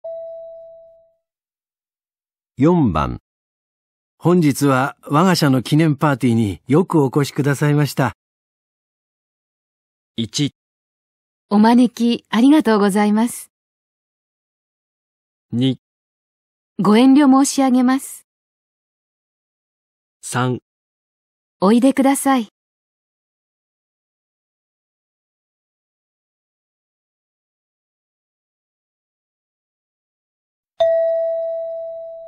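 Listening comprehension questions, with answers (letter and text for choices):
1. 男:本日はわが社の記念パーティーによくお越しくださいました。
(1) お招きありがとうございます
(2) ご遠慮申し上げます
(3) おいでください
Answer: (1) お招きありがとうございます

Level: 【N2 第2回】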